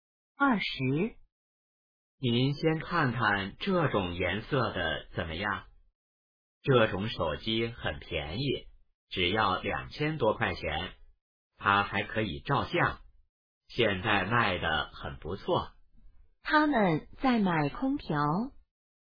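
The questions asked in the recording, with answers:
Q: 他们在买空调。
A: 错(他们在买手机)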